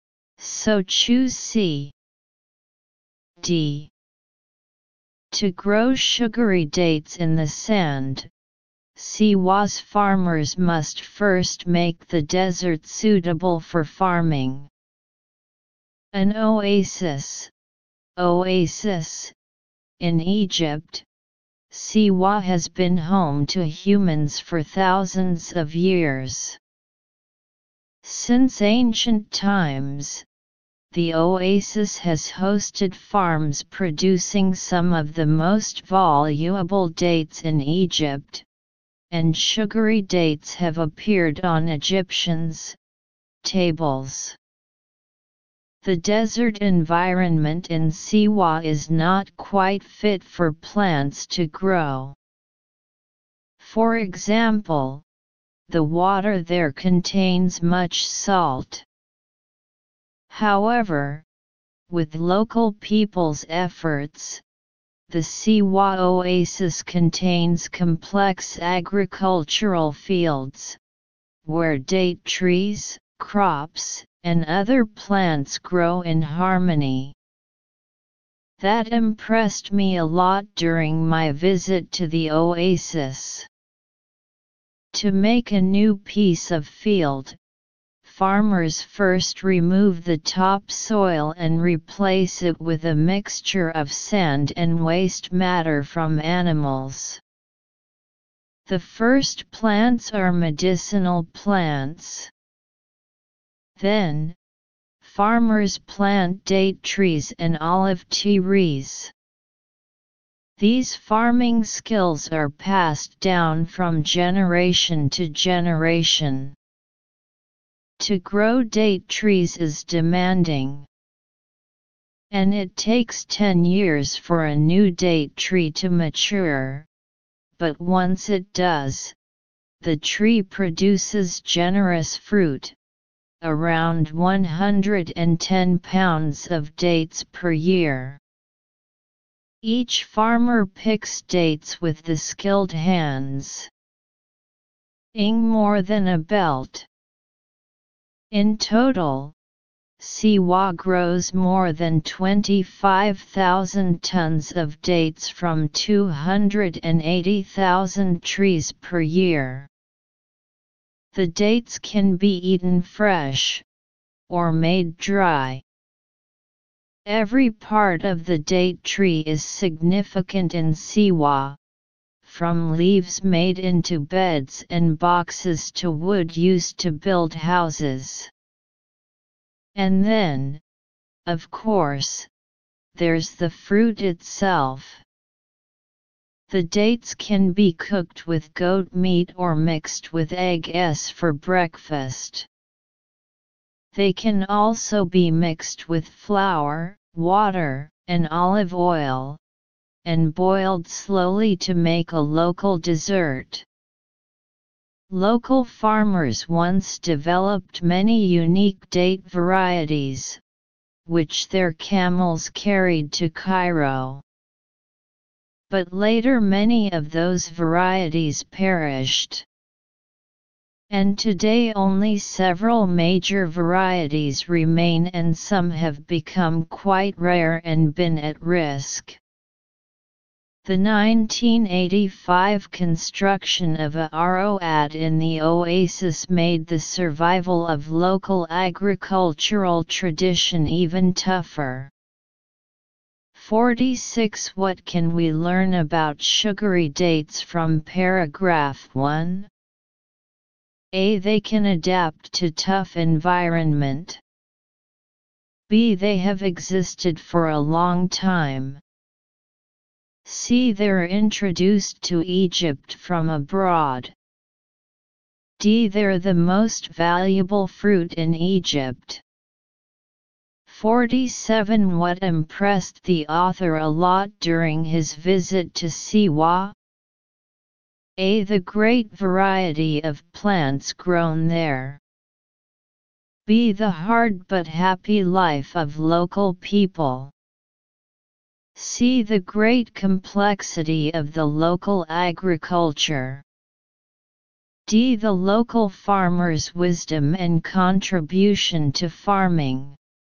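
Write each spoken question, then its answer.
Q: What can we learn about sugary dates from paragraph 1?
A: B: They have existed for a long time.

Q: What impressed the author a lot during his visit to Siwa?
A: C: The great complexity of the local agriculture.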